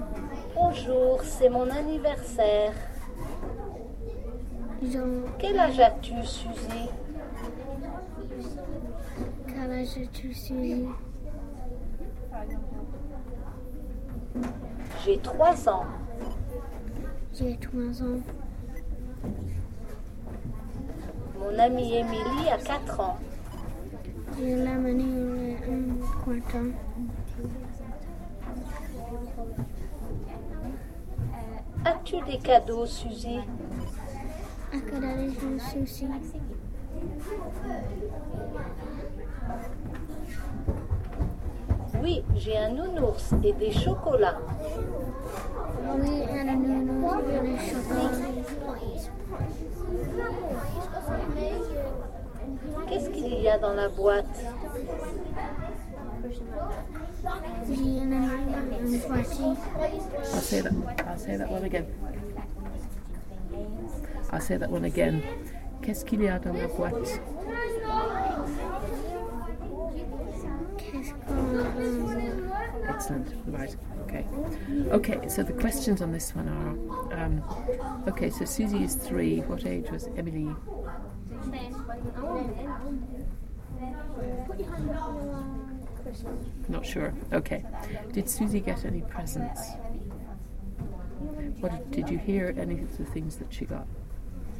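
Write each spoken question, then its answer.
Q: Did Susie get any presents?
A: Yes

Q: What did you hear any of the things that she got?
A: A teddy bear and chocolates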